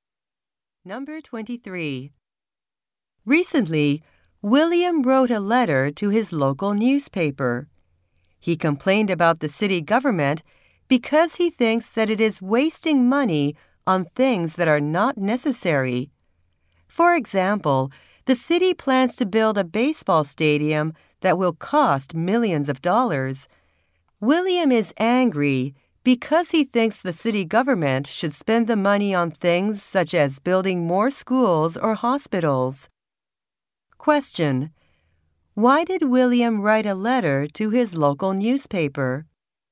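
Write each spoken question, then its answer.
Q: Why did William write a letter to his local newspaper?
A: To complain that the city government wastes money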